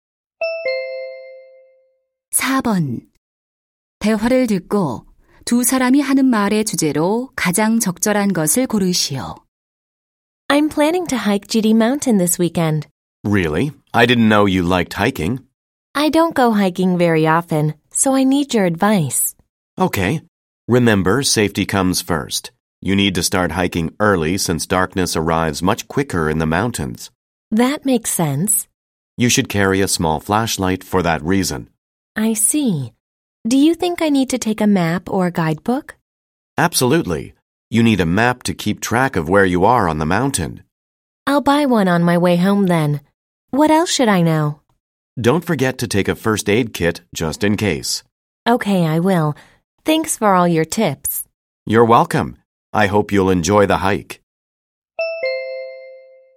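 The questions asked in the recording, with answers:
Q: 대화를 듣고 두 사람이 하는 말의 주제로 가장 적절한 것을 고르시오.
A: 안전한 등산을 위한 조언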